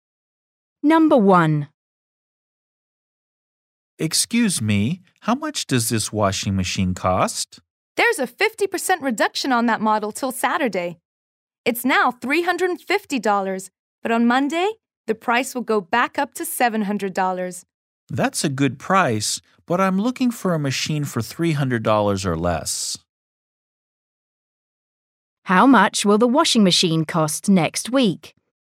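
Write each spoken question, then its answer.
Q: How much will the washing machine cost next week?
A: $700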